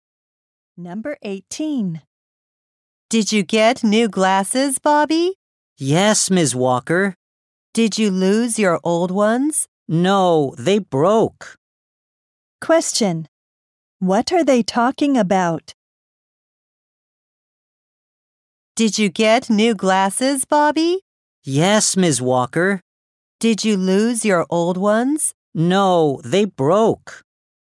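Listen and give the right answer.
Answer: Bobby's new glasses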